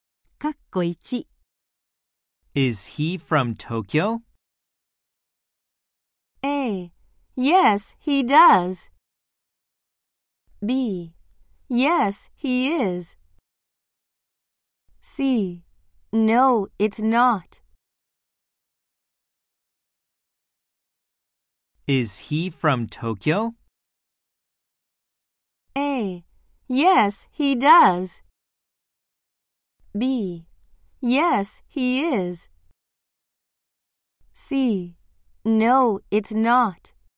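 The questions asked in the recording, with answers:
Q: Is he from Tokyo?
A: B: Yes, he is.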